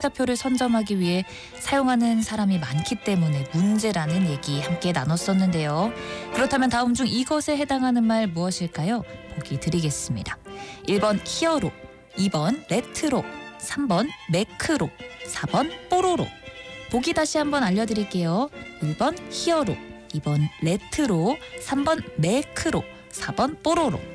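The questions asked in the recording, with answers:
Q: 그렇다면 다음 중 이것에 해당하는 말 무엇일까요?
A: 3: 매크로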